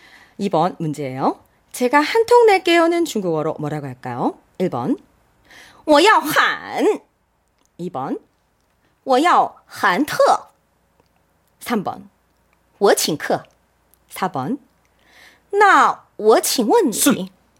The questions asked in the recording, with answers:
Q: 제가 한 통 낼게요는 중국어로 뭐라고 할까요?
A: 3번